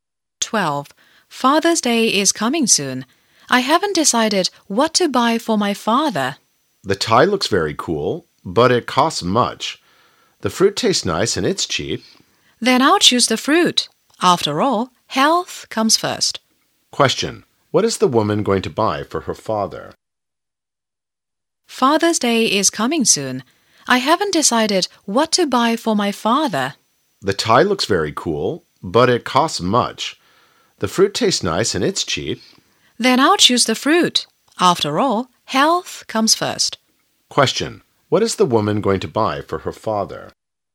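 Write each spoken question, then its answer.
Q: What is the woman going to buy for her father?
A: Fruit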